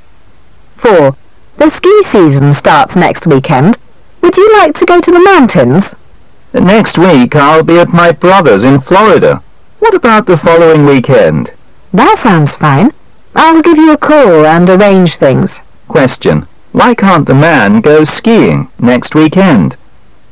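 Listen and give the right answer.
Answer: He'll be at his brother's in Florida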